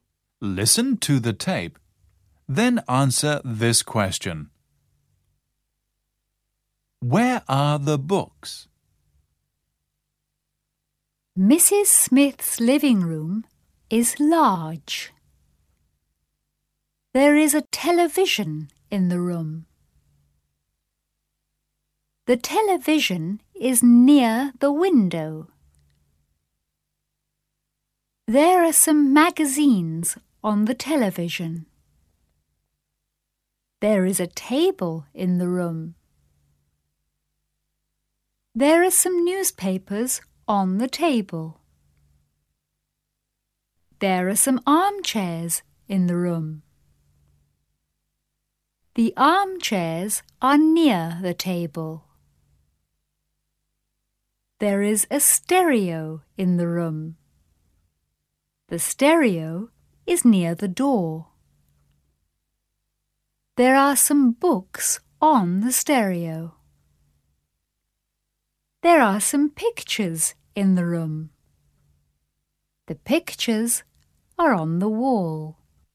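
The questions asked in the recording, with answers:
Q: Where are the books?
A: On the stereo.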